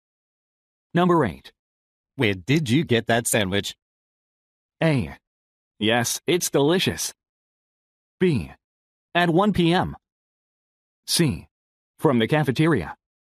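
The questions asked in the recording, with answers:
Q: Where did you get that sandwich?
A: C: From the cafeteria.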